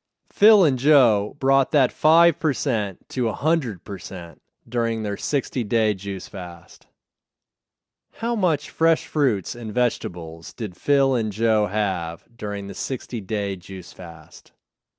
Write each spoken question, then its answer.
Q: How much fresh fruits and vegetables did Phil and Joe have during the 60-day juice fast?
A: They had 100% fresh fruits and vegetables during the 60-day juice fast.